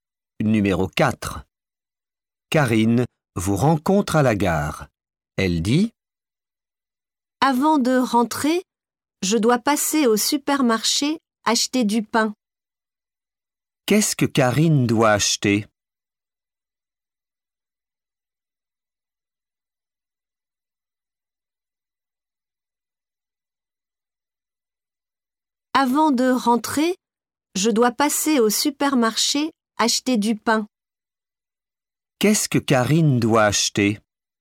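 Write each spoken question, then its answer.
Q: Qu'est-ce que Karine doit acheter ?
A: Du pain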